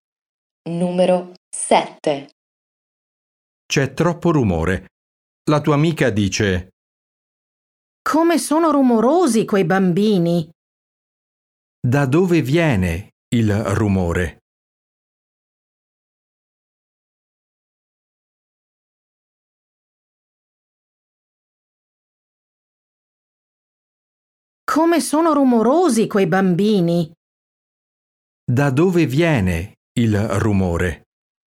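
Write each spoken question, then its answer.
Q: Da dove viene il rumore?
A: Dai bambini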